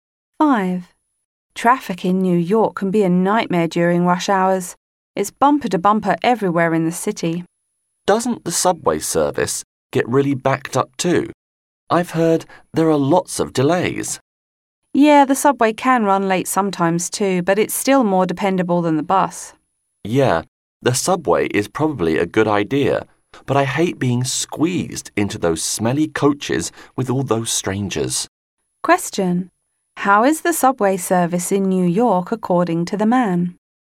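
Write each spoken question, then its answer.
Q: How is the subway service in New York according to the man?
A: It can run late sometimes but is more dependable than the bus.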